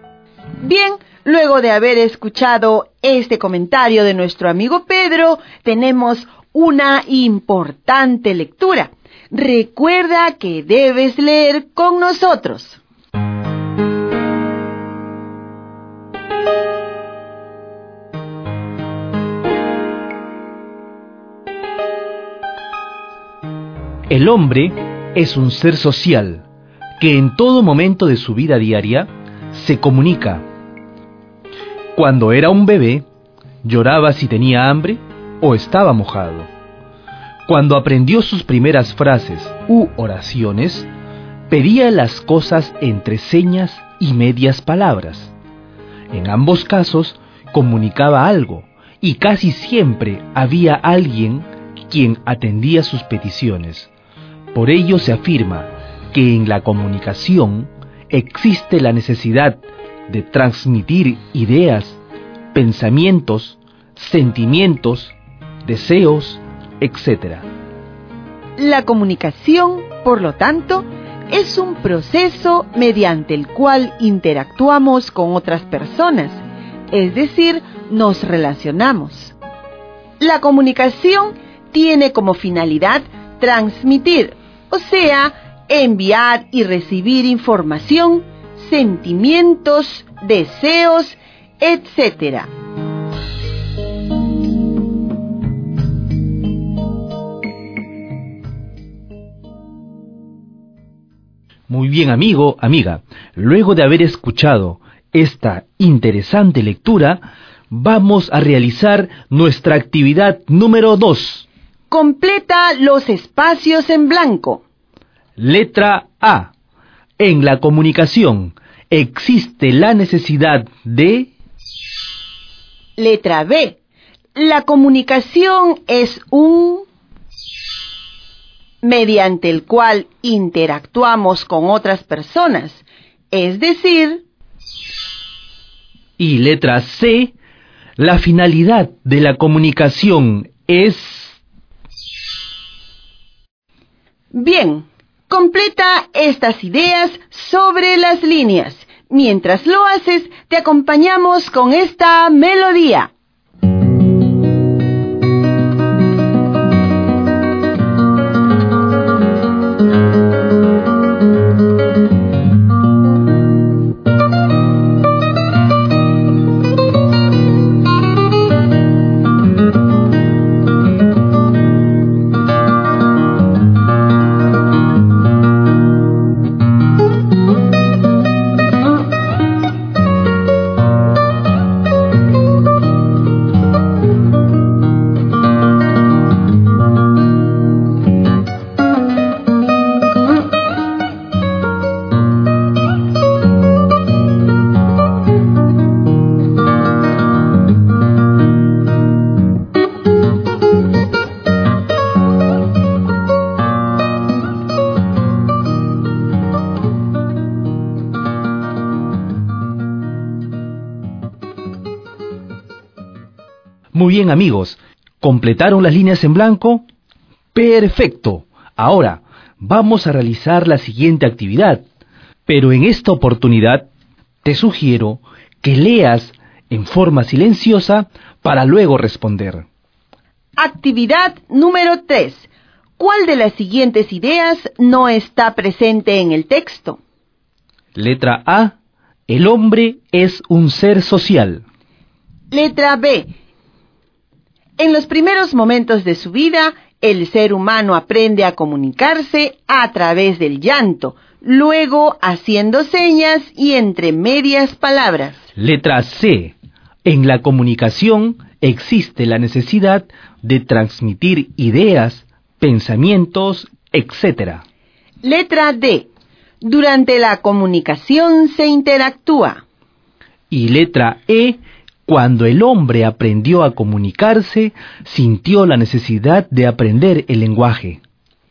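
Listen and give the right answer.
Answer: E: Cuando el hombre aprendió a comunicarse, sintió la necesidad de aprender el lenguaje.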